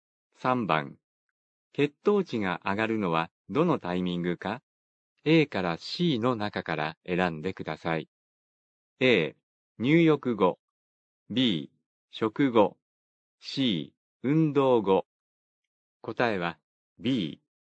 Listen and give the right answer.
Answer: 答えは B。